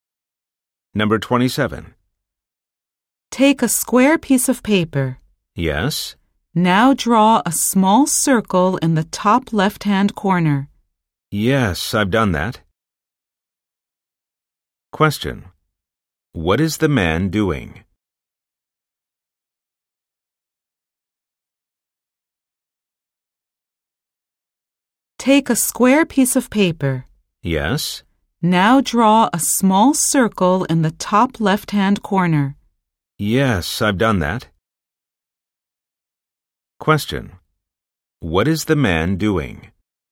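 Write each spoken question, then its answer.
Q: What is the man doing?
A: Following instructions to draw a circle on a square piece of paper.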